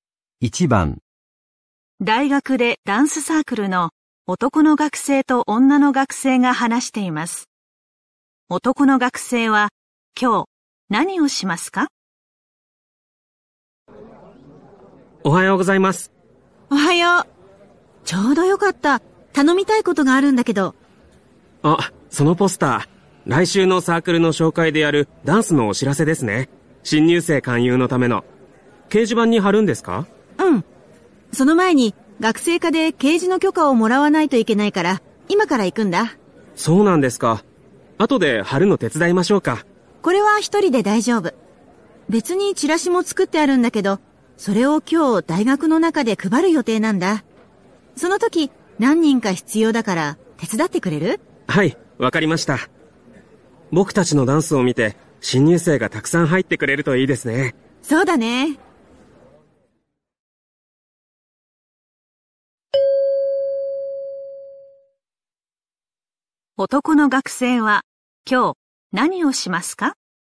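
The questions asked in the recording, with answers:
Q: 男の学生は今日何をしますか?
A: 大学の中でチラシを配るのを手伝う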